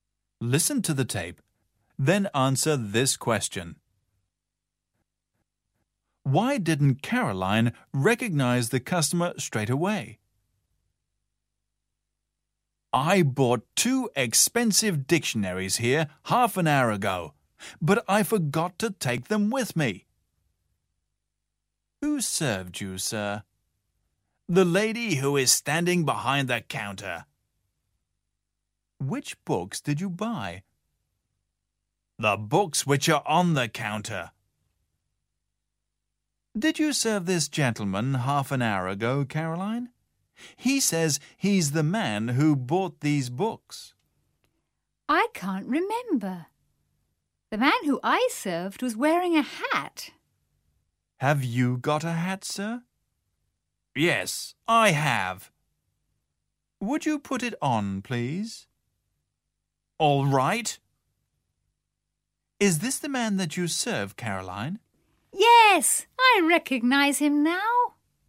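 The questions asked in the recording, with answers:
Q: Why didn't Caroline recognize the customer straight away?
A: Because he wasn't wearing his hat; the man she served had been wearing one.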